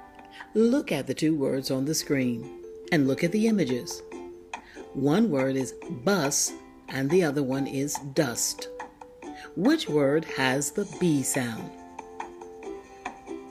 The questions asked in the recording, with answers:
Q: Which word has the B sound?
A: That's right, bus has the B sound.